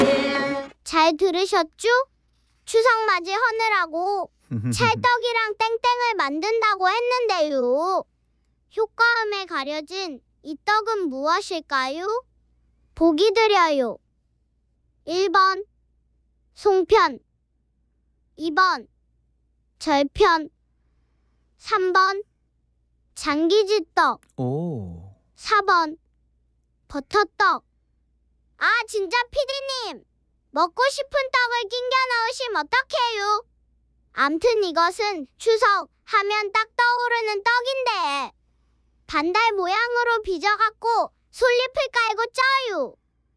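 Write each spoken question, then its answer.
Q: 효과음에 가려진 이 떡은 무엇일까요?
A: 1번: 송편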